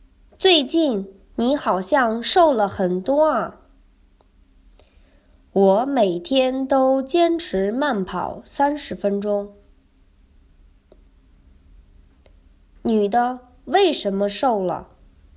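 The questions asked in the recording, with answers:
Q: 女的为什么瘦了?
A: 她每天坚持慢跑30分钟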